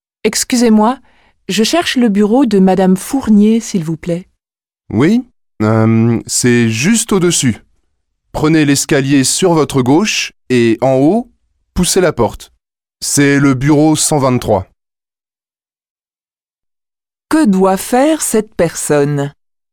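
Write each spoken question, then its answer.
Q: Que doit faire cette personne ?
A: Prendre l'escalier à gauche, monter et pousser la porte du bureau 123.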